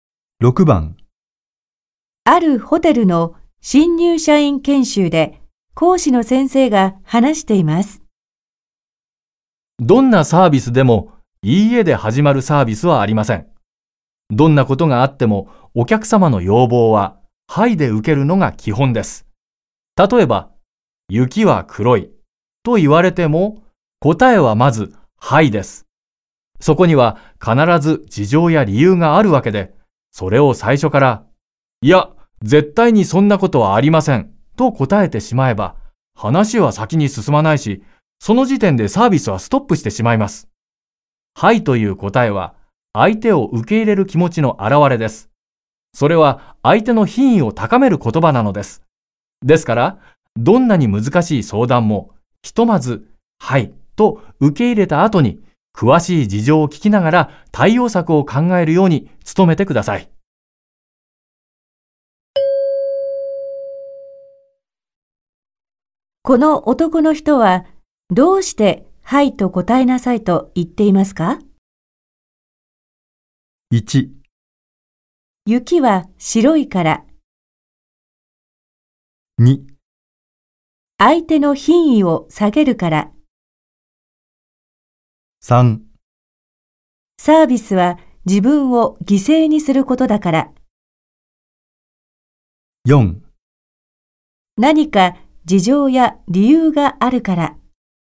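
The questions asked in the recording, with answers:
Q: の男の人はどうしてはいと答えなさいと言っていますか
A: 4: 何か事情や理由があるから。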